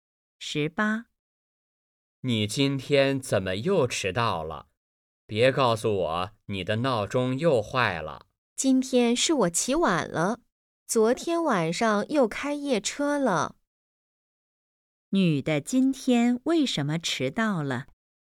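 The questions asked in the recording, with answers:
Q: 女的今天为什么迟到了?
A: 昨天晚上开夜车,起晚了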